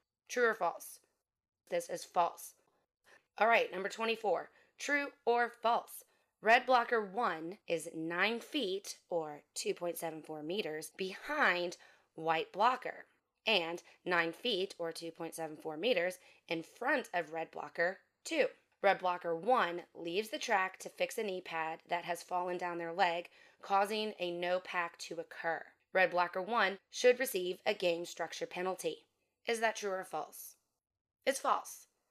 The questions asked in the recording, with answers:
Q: Red blocker 1 should receive a game structure penalty.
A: It's false.